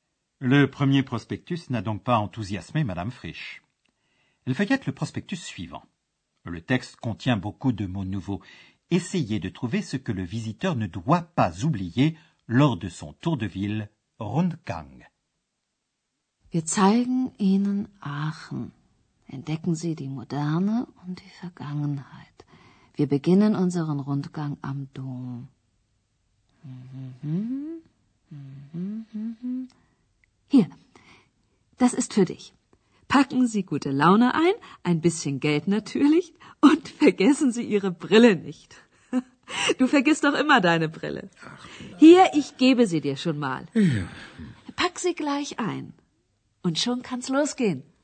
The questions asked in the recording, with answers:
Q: Essayez de trouver ce que le visiteur ne doit pas oublier lors de son tour de ville, Rundgang.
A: Le visiteur est prié avec Moore de ne pas oublier ses lunettes.